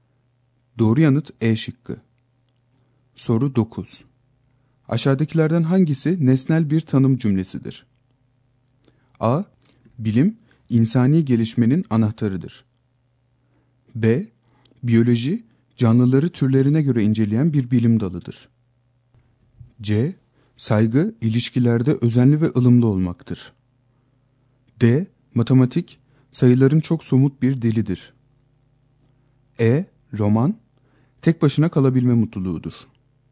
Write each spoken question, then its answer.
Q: Aşağıdakilerden hangisi nesnel bir tanım cümlesidir?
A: Doğru yanıt B şıkkı.